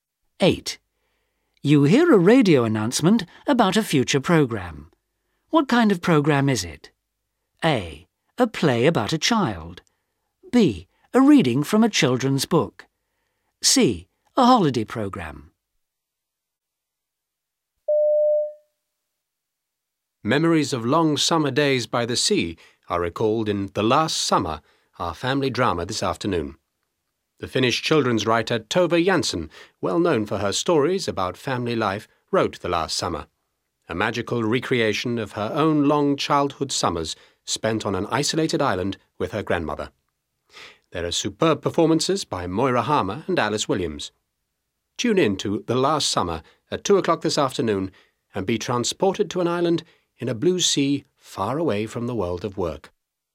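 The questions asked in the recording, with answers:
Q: What kind of programme is it?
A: A: A play about a child.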